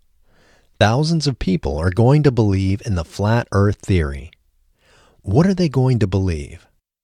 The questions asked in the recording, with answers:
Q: What are they going to believe?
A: They are going to believe in the Flat Earth theory.